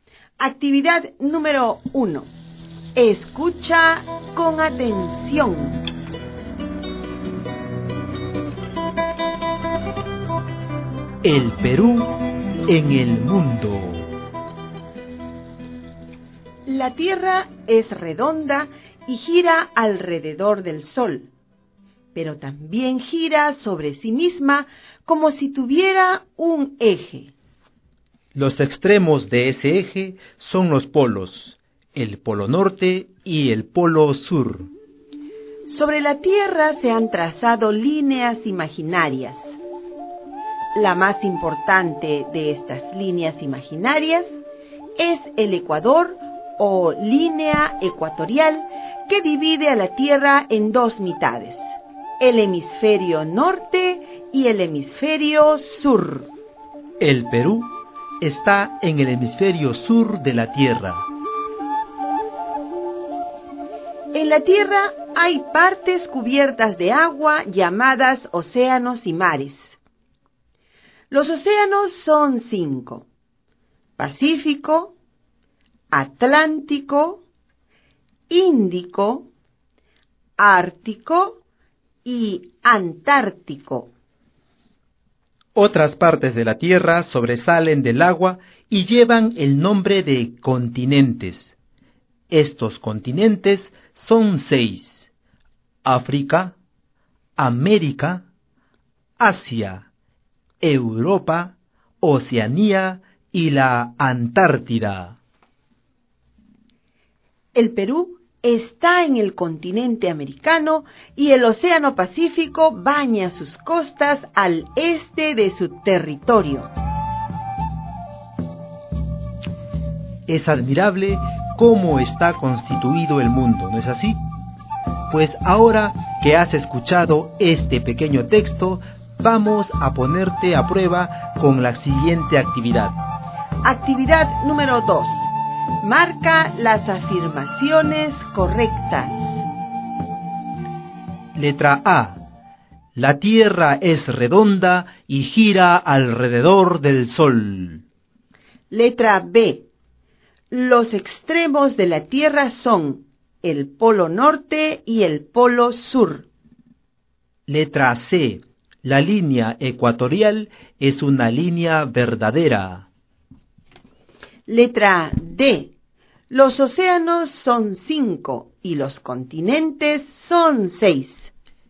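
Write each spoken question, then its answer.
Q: Marca las afirmaciones correctas.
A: A: La Tierra es redonda y gira alrededor del Sol; B: Los extremos de la Tierra son el polo norte y el polo sur; D: Los océanos son 5 y los continentes son 6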